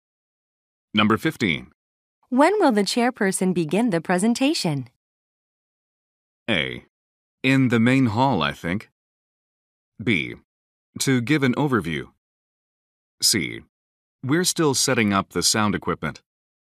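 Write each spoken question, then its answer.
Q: When will the chairperson begin the presentation?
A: C: We're still setting up the sound equipment.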